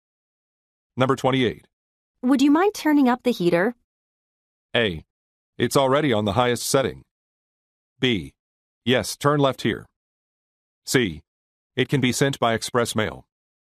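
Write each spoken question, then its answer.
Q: Would you mind turning up the heater?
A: A: It's already on the highest setting.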